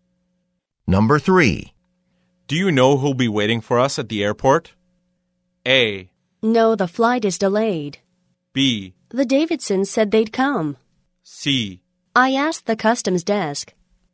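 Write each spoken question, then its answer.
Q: Do you know who'll be waiting for us at the airport?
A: B: The Davidsons said they'd come.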